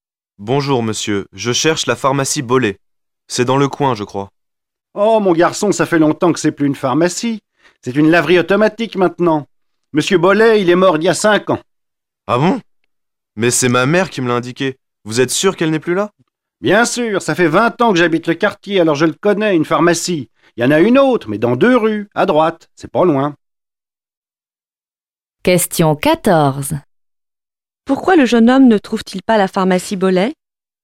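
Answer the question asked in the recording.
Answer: Parce que ce n'est plus une pharmacie : c'est devenu une laverie automatique (M. Bollet est mort il y a 5 ans).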